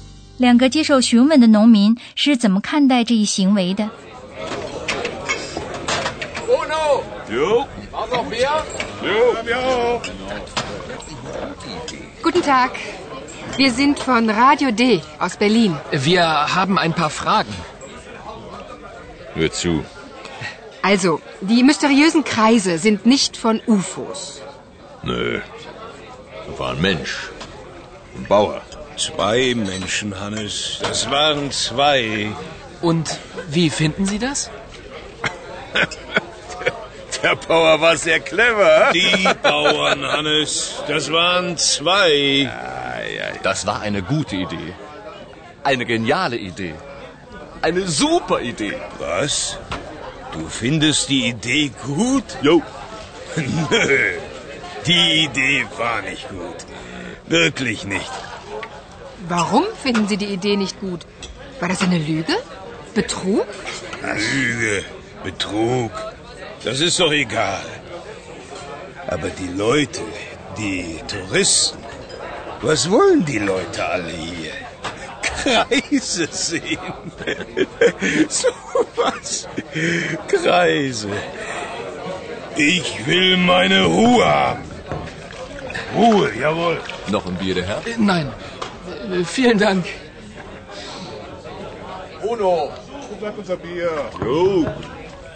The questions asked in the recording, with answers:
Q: 两个接受询问的农民是怎么看待这一行为的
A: 其中的一个觉得那个农民非常聪明。